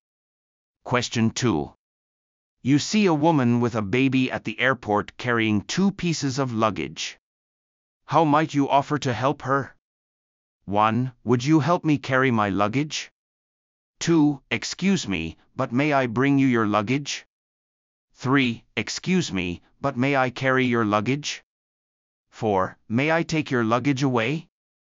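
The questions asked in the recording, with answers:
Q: How might you offer to help her?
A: 3: Excuse me, but may I carry your luggage?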